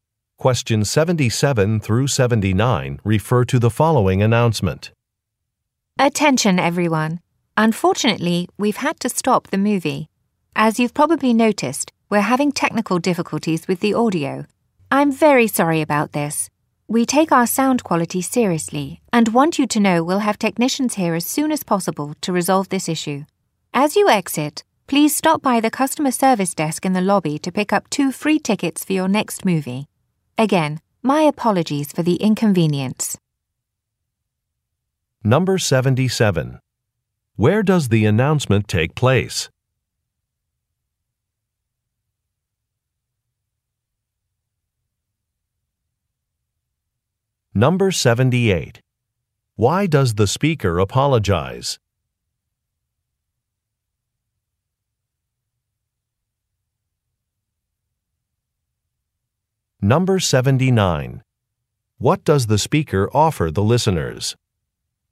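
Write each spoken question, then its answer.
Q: Where does the announcement take place?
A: At a movie theater

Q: Why does the speaker apologize?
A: There are technical problems with the audio

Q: What does the speaker offer the listeners?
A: Two free movie tickets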